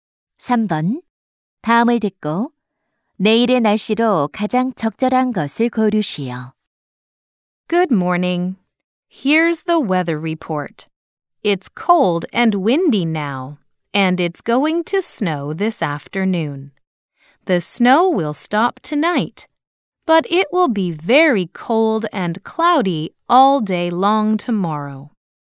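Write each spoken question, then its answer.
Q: 다음을 듣고 내일의 날씨로 가장 적절한 것을 고르시오.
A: 매우 춥고 흐림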